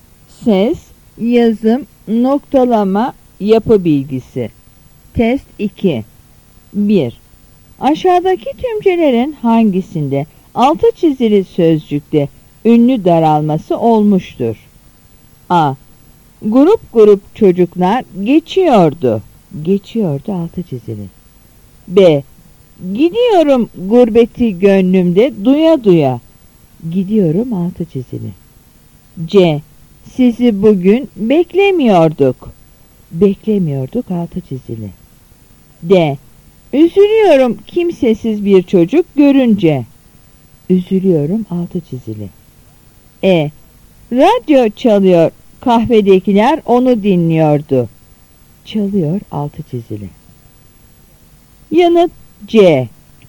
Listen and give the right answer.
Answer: Yanıt C.